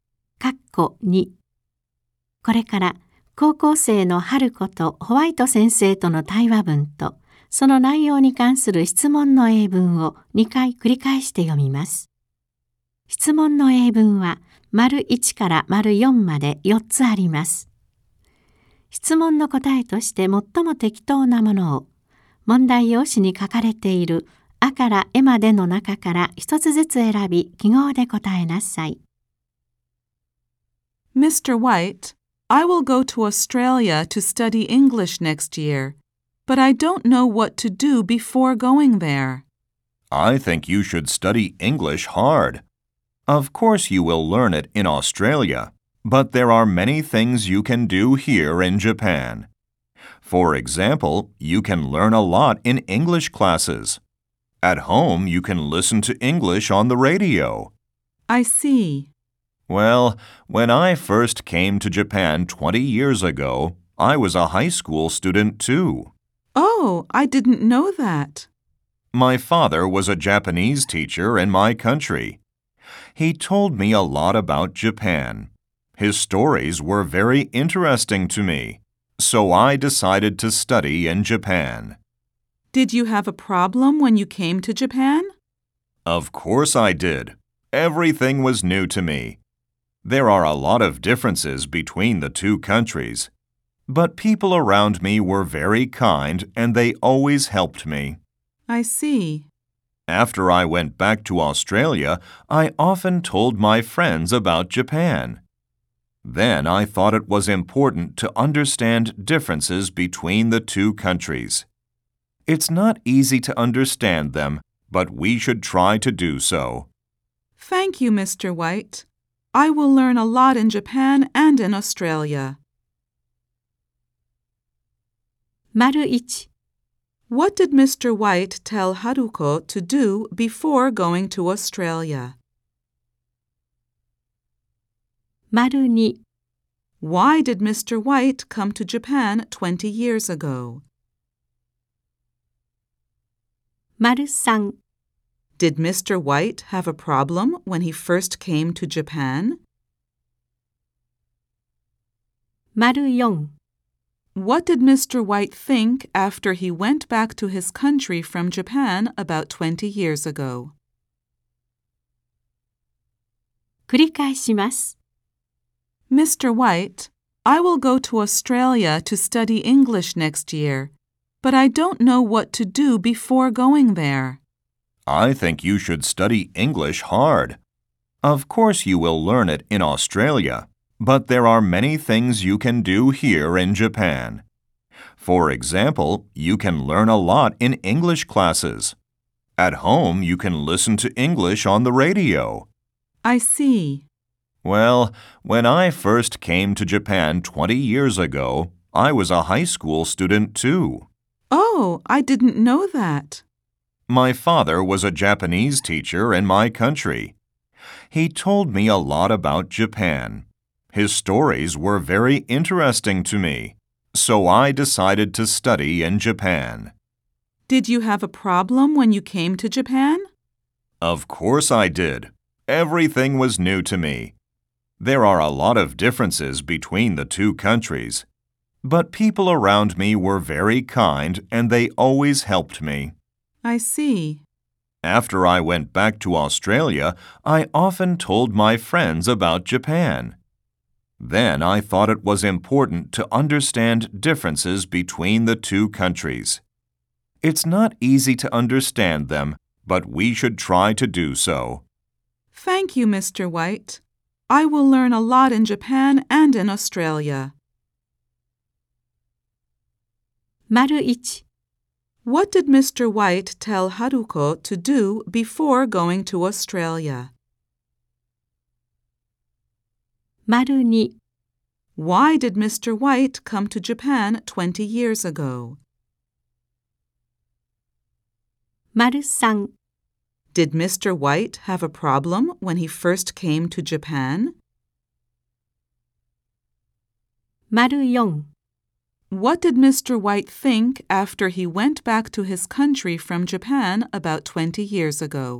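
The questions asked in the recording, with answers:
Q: What did Mr. White tell Haruko to do before going to Australia?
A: To study English hard

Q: Why did Mr. White come to Japan 20 years ago?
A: Because his father's stories about Japan were very interesting to him

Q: Did Mr. White have a problem when he first came to Japan?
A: Yes, he did

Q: What did Mr. White think after he went back to his country from Japan about 20 years ago?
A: That it was important to understand differences between the two countries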